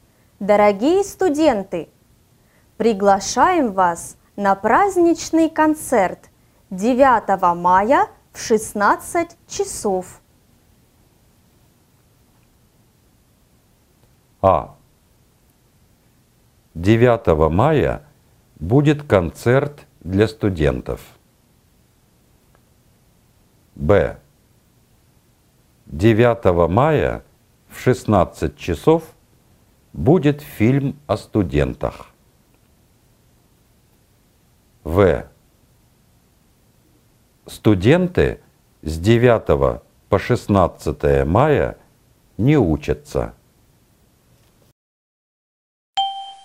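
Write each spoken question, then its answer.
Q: Дорогие студенты, приглашаем вас на праздничный концерт 9 мая в 16 часов.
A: А: 9 мая будет концерт для студентов.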